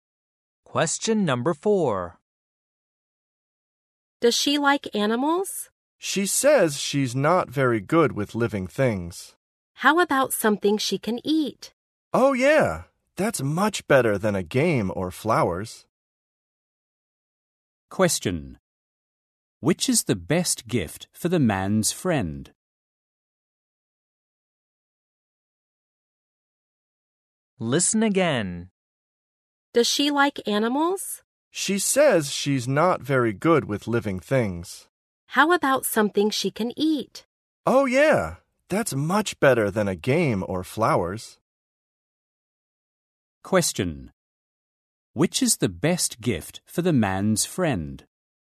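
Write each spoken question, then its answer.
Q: Which is the best gift for the man's friend?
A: Something to eat (food)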